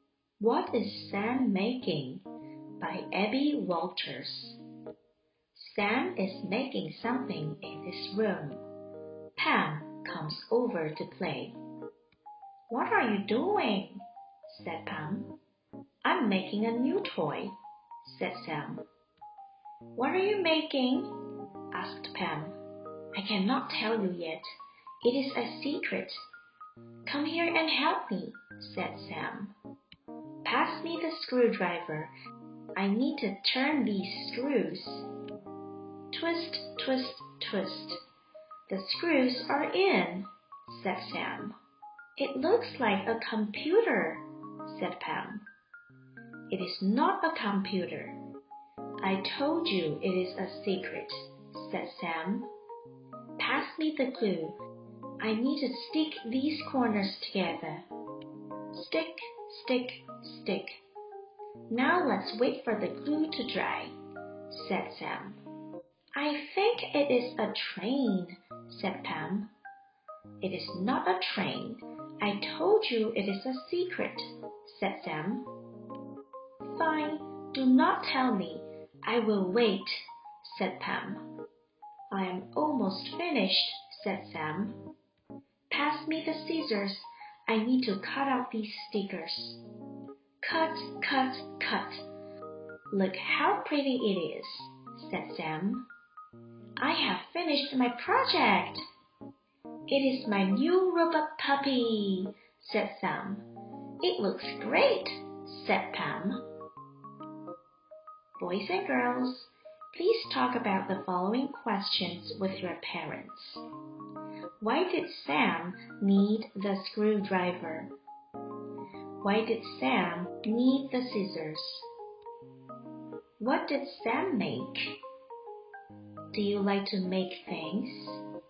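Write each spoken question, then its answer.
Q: Why did Sam need the screwdriver?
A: To turn the screws

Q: Why did Sam need the scissors?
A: To cut out the stickers

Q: What did Sam make?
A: A robot puppy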